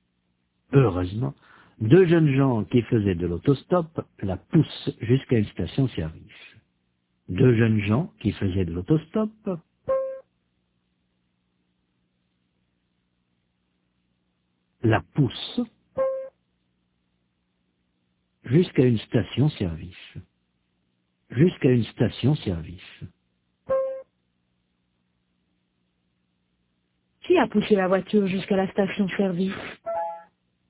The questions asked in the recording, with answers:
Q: Qui a poussé la voiture jusqu'à la station-service ?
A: Deux jeunes gens qui faisaient de l'autostop.